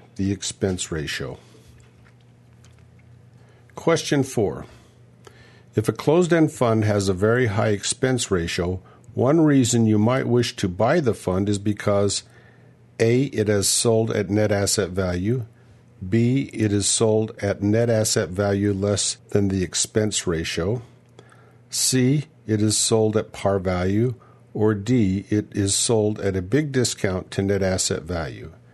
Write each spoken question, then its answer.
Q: If a closed-end fund has a very high expense ratio, one reason you might wish to buy the fund is because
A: And the answer is D. It is sold at a big discount to net asset value.